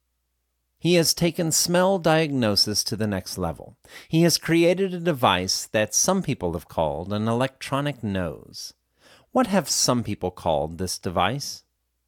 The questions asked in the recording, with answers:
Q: What have some people called this device?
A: Some people have called this device an electronic nose.